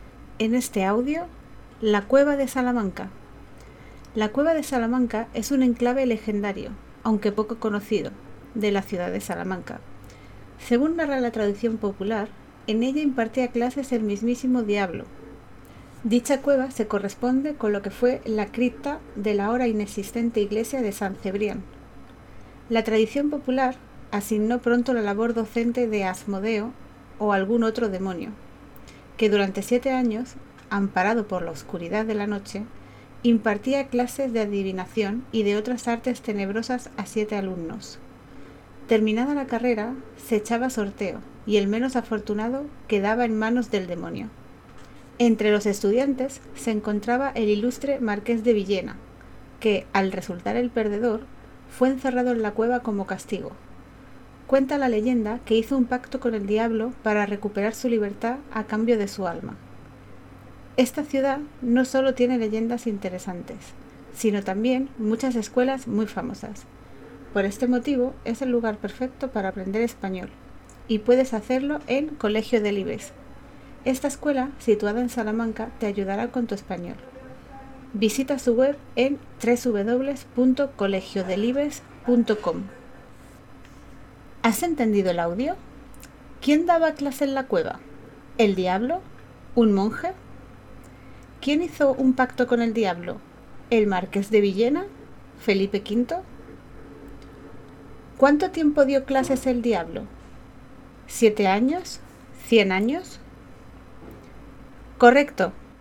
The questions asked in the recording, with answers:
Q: ¿Quién daba clase en la cueva?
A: el Diablo

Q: ¿Cuánto tiempo dio clases el diablo?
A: Siete Años